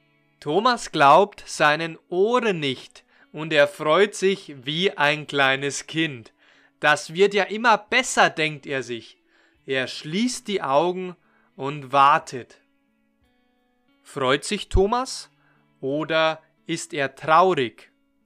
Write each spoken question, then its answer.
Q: Freut sich Thomas oder ist er traurig.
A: Er freut sich. Er freut sich wie ein kleines Kind.